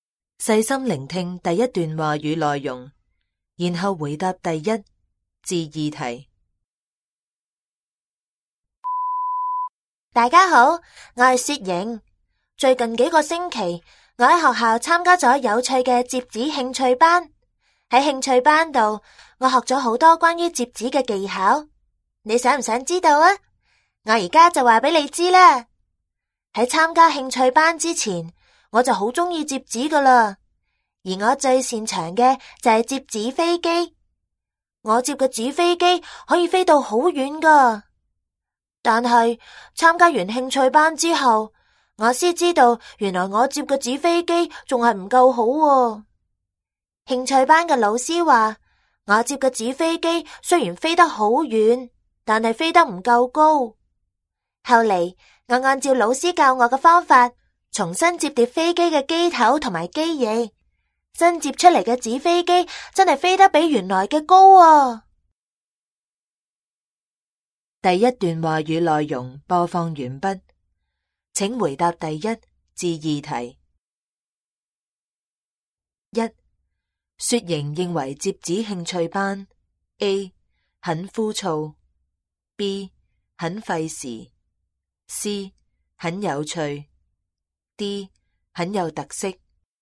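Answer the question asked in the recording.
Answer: C: 很有趣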